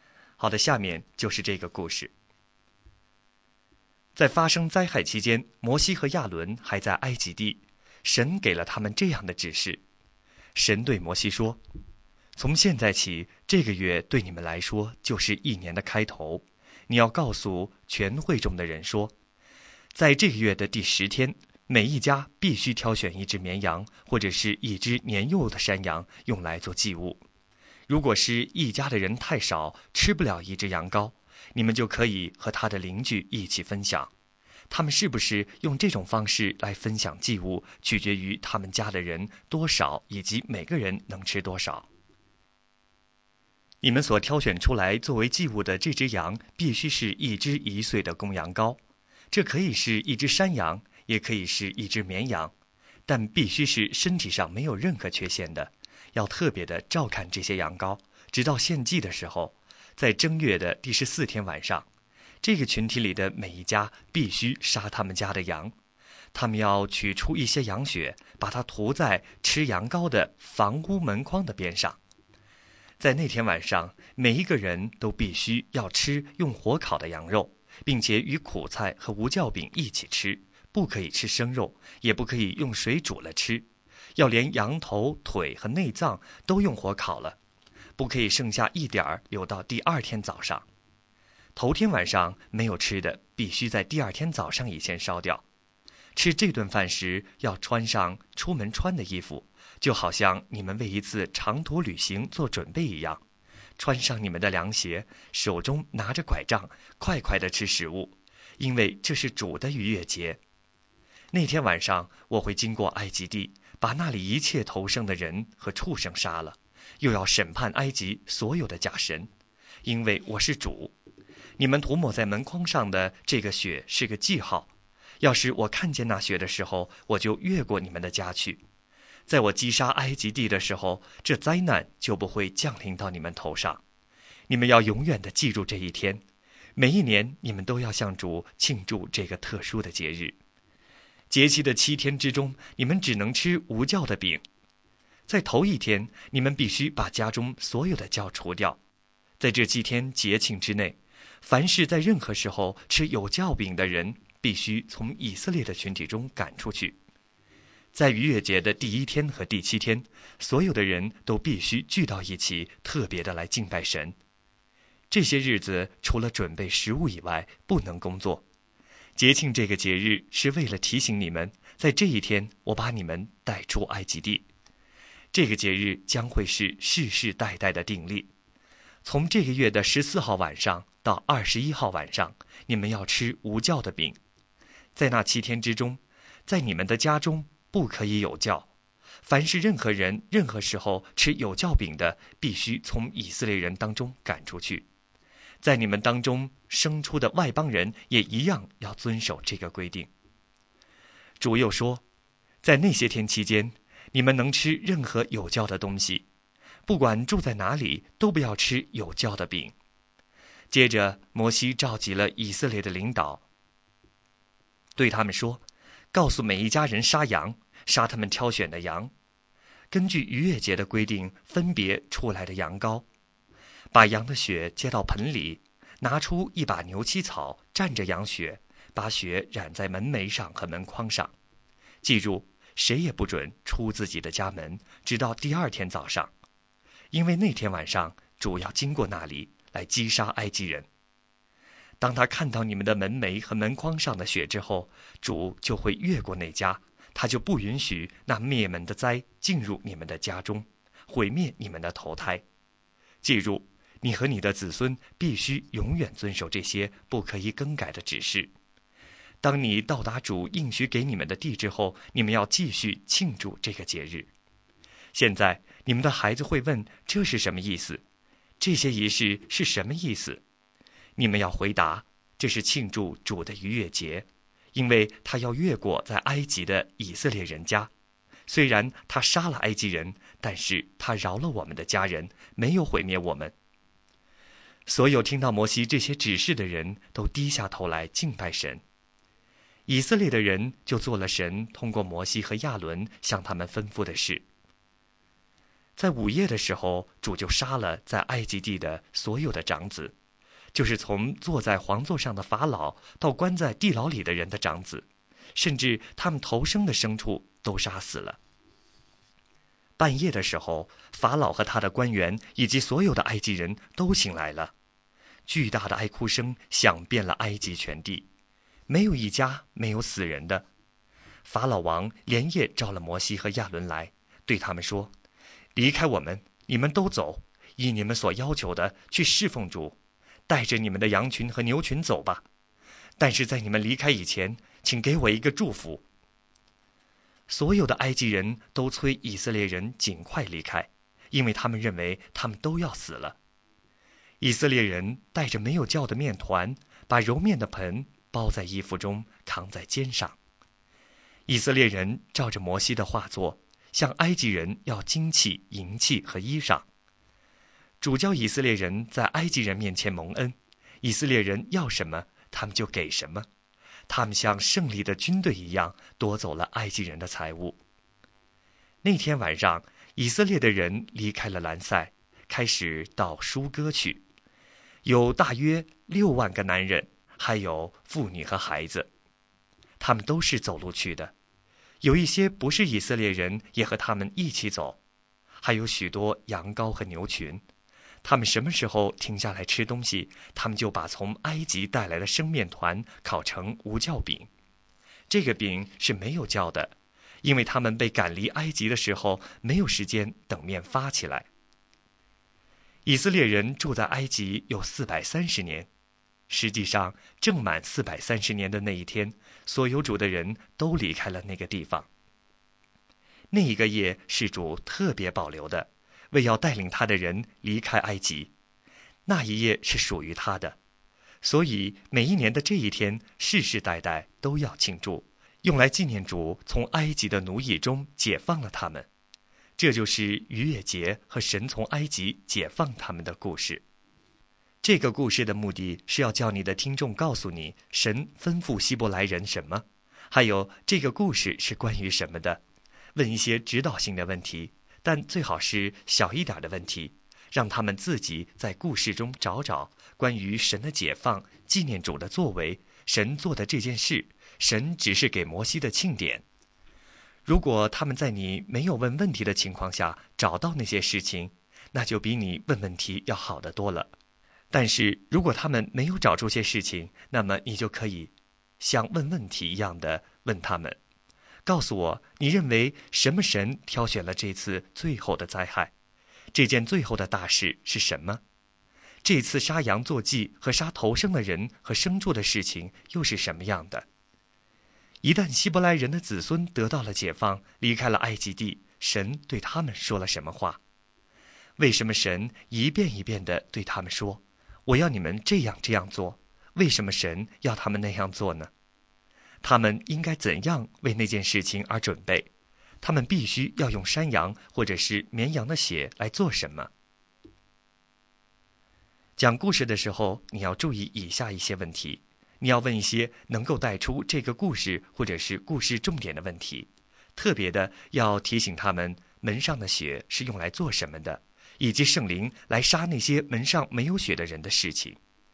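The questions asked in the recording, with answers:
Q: 他们必须要用山羊或者是绵羊的血来做什么?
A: 涂在门楣和门框上作记号,主看见血就越过那家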